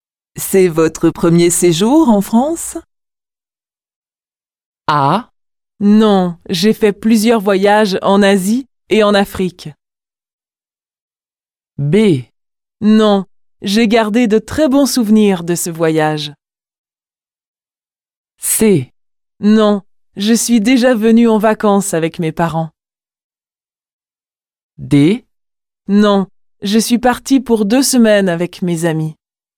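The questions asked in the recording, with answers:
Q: C'est votre premier séjour en France?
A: C: Non, je suis déjà venue en vacances avec mes parents.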